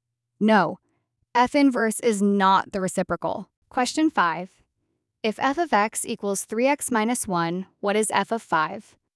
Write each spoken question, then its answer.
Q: If f of x equals 3x minus 1, what is f of 5?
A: 3 times 5 minus 1 equals 14.